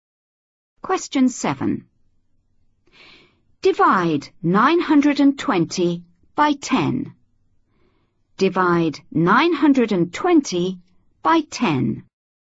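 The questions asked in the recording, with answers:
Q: Divide 920 by 10.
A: 92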